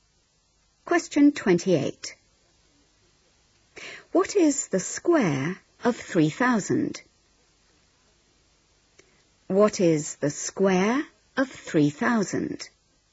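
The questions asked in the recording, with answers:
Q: What is the square of 3,000?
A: 9,000,000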